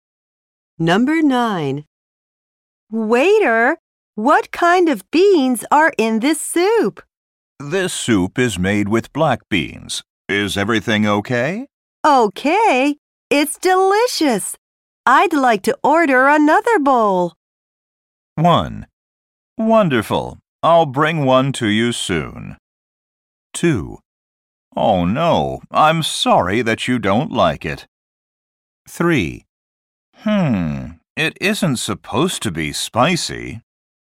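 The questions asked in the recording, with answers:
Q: Okay, it's delicious. I'd like to order another bowl.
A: 1: Wonderful. I'll bring one to you soon.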